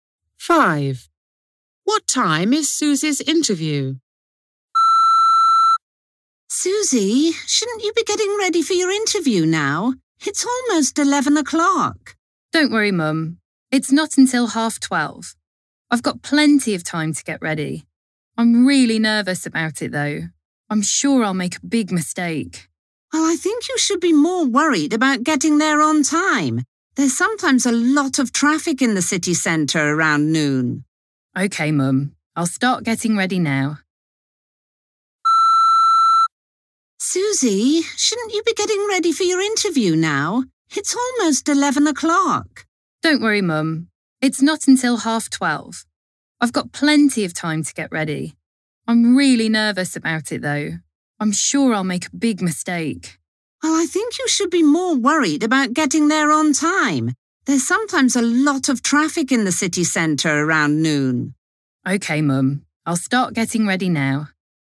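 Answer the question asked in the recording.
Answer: 12:30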